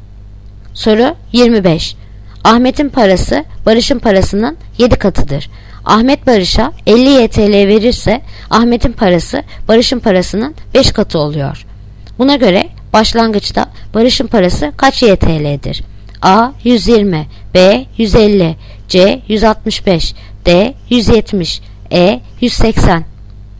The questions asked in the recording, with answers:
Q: Buna göre başlangıçta Barış'ın parası kaç YTL'dir?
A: Yanıt Bursa 150.